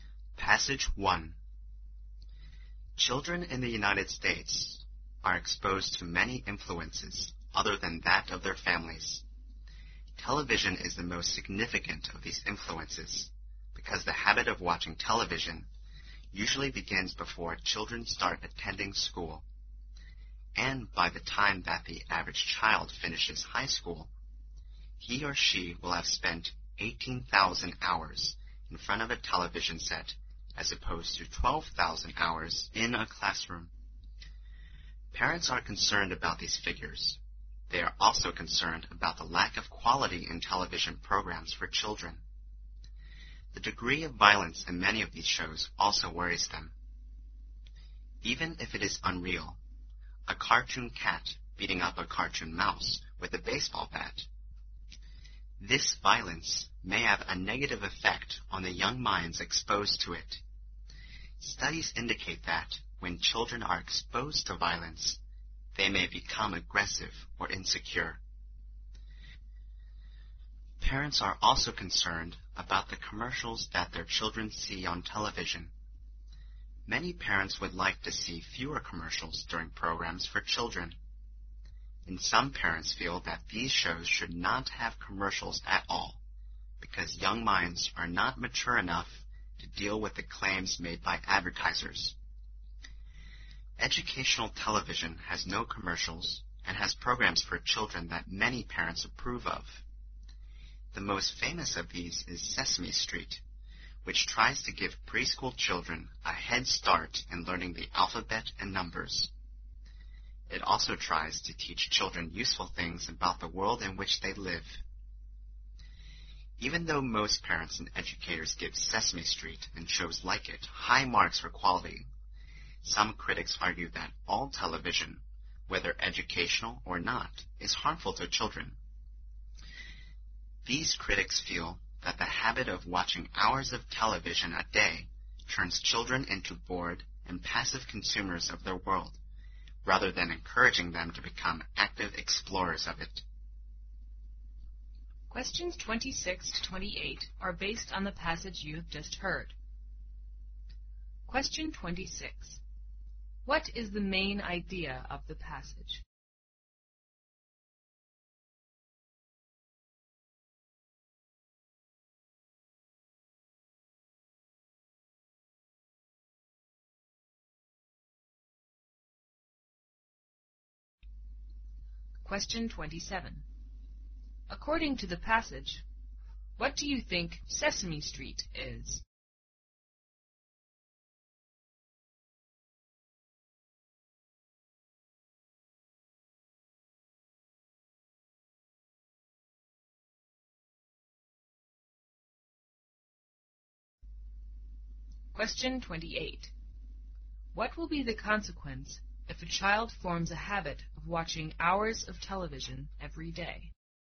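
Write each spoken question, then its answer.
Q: According to the passage, what do you think Sesame Street is?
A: An educational TV program without commercials that helps preschool children learn the alphabet and numbers

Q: What will be the consequence if a child forms a habit of watching hours of television every day?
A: The child becomes a bored and passive consumer of the world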